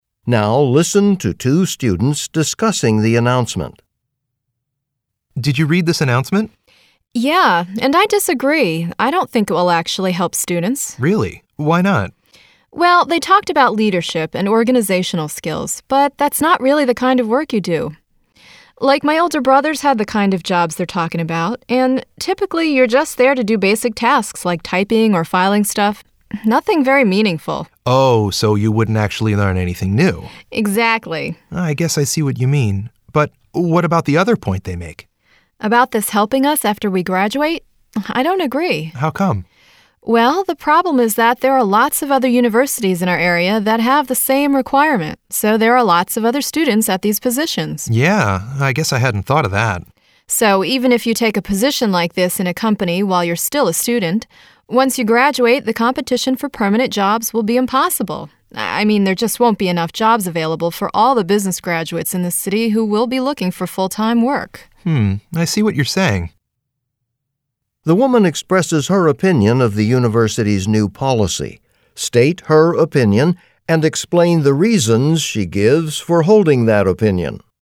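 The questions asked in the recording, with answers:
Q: The woman expresses her opinion of the university's new policy. State her opinion and explain the reasons she gives for holding that opinion.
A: She disagrees with it. First, students only do basic tasks like typing or filing, so they won't learn leadership or organizational skills. Second, many nearby universities have the same requirement, so after graduation there will be too much competition and not enough full-time jobs.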